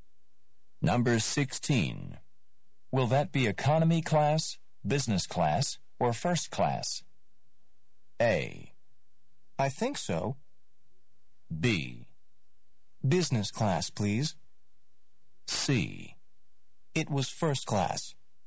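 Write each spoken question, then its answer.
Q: Will that be economy class, business class, or first class?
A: B: Business class, please.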